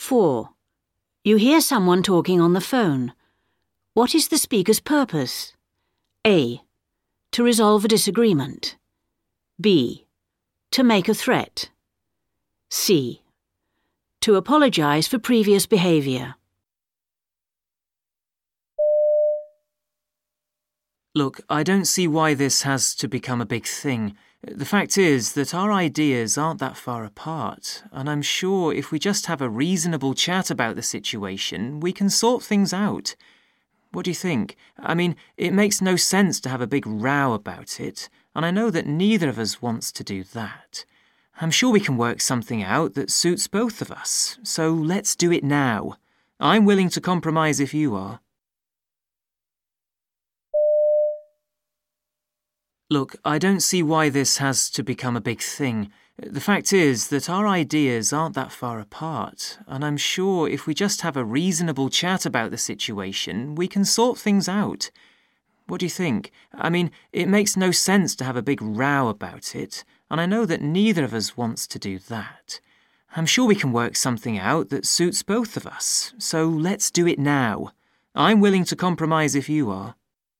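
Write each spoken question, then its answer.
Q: What is the speaker's purpose?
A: A: To resolve a disagreement.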